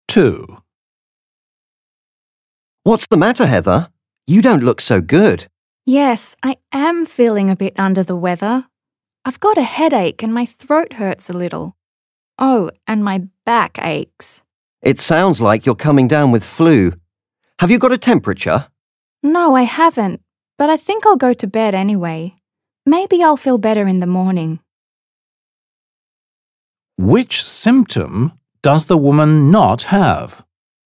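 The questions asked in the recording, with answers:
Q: Which symptom does the woman not have?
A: A temperature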